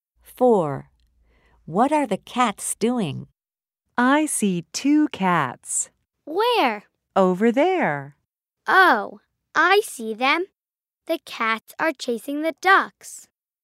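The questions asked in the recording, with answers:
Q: What are the cats doing?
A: Chasing the ducks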